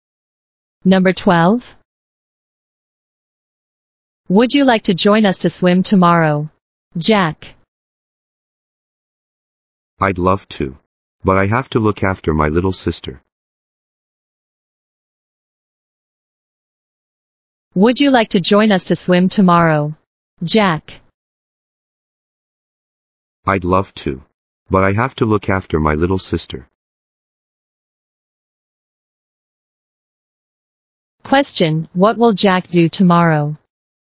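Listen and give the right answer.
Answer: Look after his little sister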